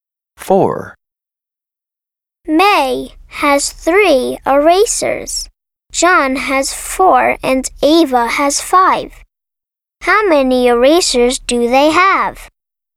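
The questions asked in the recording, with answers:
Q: How many erasers do they have?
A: 12 erasers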